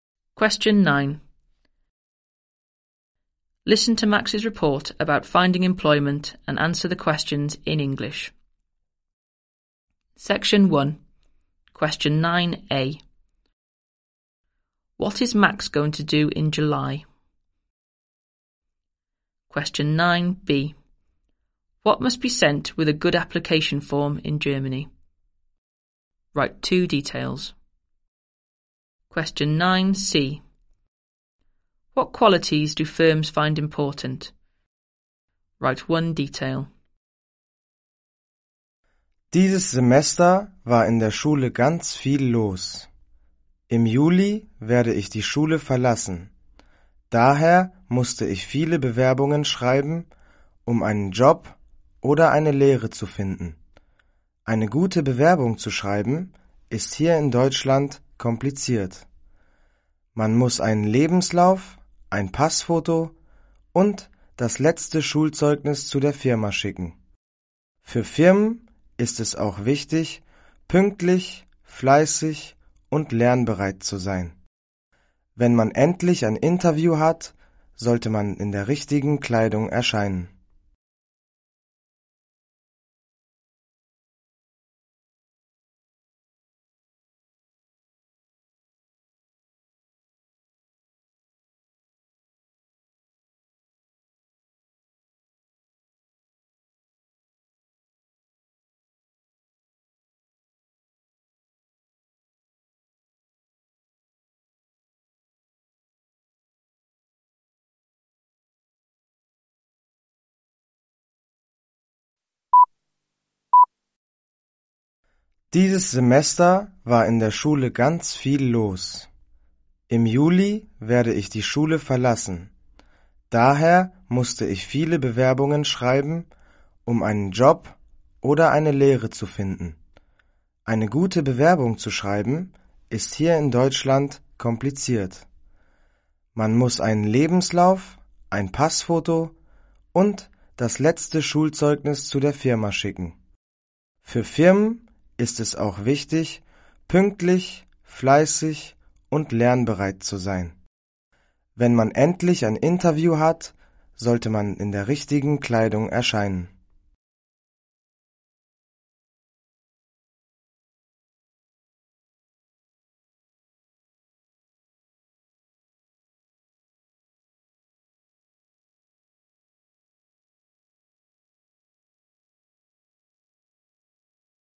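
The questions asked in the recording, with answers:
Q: What is Max going to do in July?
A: Leave school

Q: What must be sent with a good application form in Germany?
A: A CV, a passport photo and the last school report (any two)

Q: What qualities do firms find important?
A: Being punctual, hard-working and willing to learn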